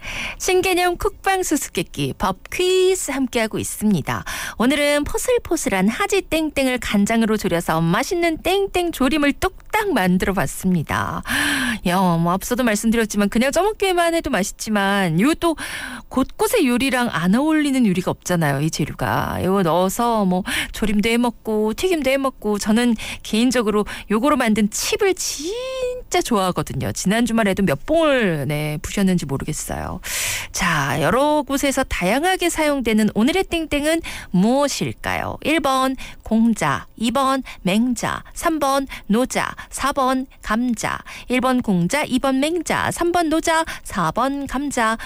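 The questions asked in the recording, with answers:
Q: 자, 여러 곳에서 다양하게 사용되는 오늘의 땡땡은 무엇일까요?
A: 4번: 감자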